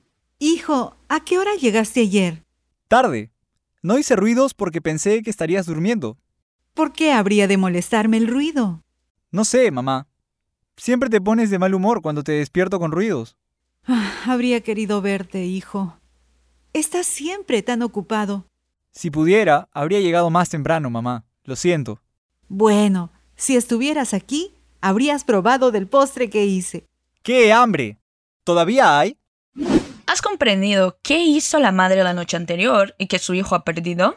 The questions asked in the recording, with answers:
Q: ¿Has comprendido qué hizo la madre la noche anterior y que su hijo ha perdido?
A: Qué lástima, el chico ha perdido el postre a sobremesa muy rica de su mamá.